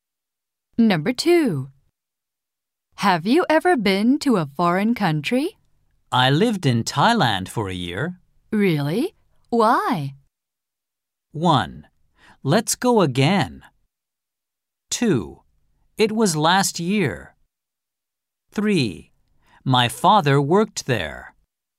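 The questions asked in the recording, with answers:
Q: Really? Why?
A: 3: My father worked there.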